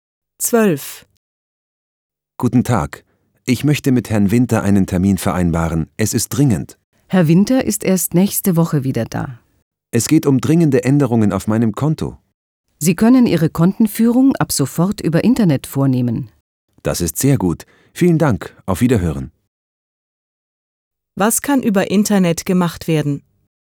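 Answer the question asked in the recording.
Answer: Die Kontenführung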